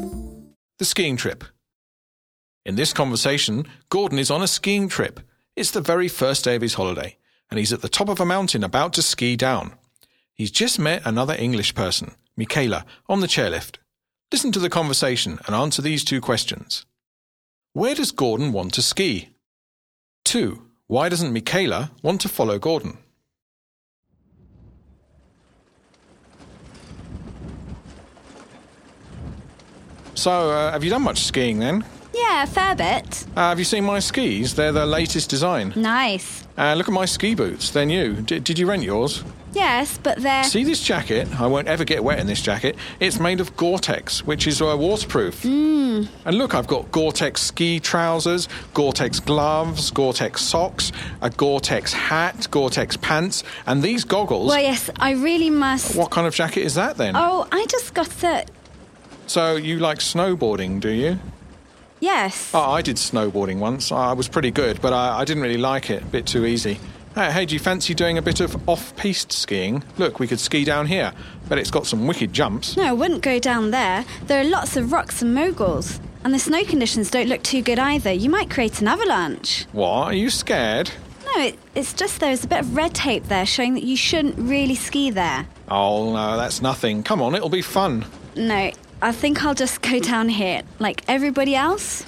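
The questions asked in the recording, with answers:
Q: Where does Gordon want to ski?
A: Off-piste, down a dangerous slope that has rocks, moguls and red tape

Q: Why doesn't Michaela want to follow Gordon?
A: It's dangerous: there are rocks and moguls, the snow is poor, there could be an avalanche, and red tape shows you shouldn't ski there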